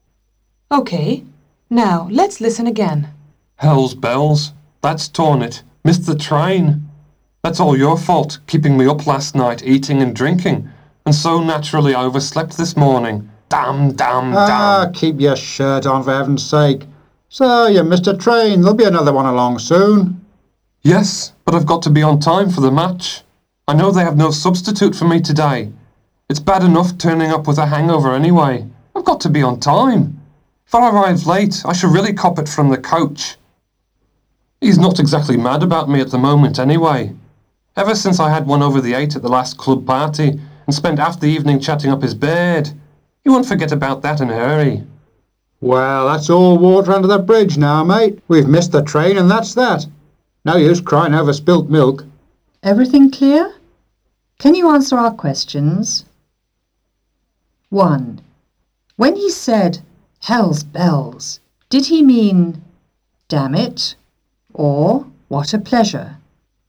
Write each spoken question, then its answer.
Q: When he said, "Hell's bells," did he mean, "Damn it," or "What a pleasure"?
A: Of course, he meant "damn it."